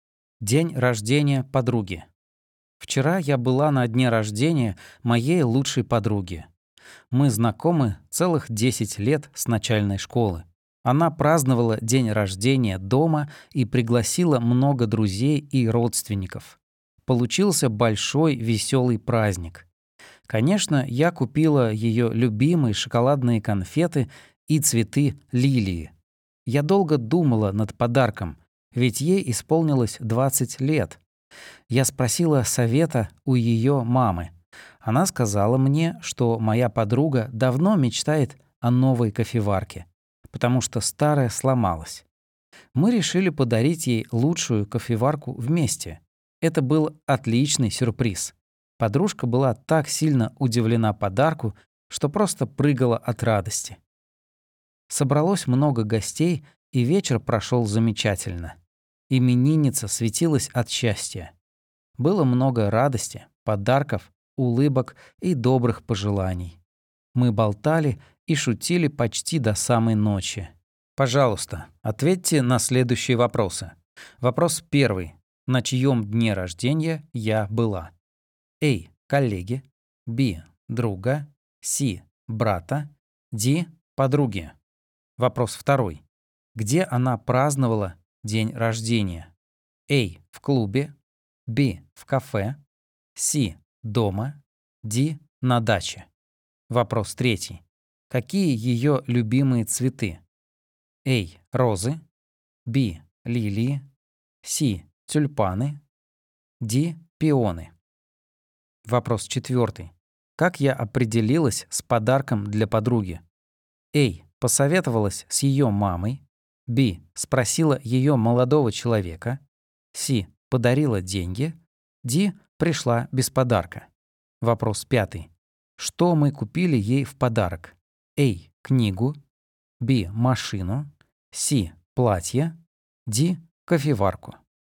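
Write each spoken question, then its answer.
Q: На чьем дне рождения я была?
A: D: Подруги

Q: Где она праздновала день рождения?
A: C: Дома

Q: Какие ее любимые цветы?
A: B: Лилии

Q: Как я определилась с подарком для подруги?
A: A: Посоветовалась с ее мамой

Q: Что мы купили ей в подарок?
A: D: Кофеварку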